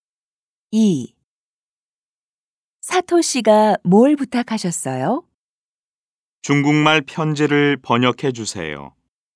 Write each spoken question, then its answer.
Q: 사토 씨가 뭘 부탁하셨어요?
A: 사토 씨가 중국말 편지를 번역해 달라고 해요.